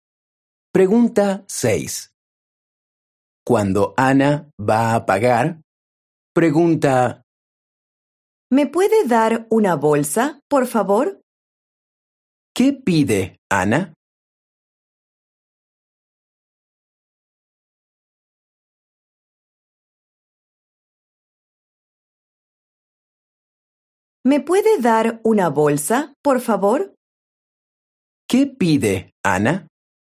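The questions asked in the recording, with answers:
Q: ¿Qué pide Ana?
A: Una bolsa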